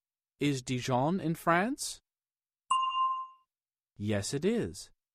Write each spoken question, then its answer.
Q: Is Dijon in France?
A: Yes, it is.